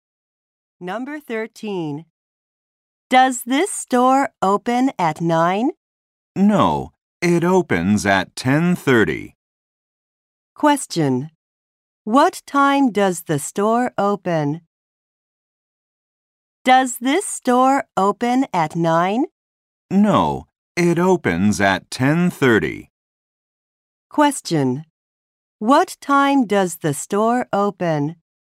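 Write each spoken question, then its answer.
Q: What time does the store open?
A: At 10:30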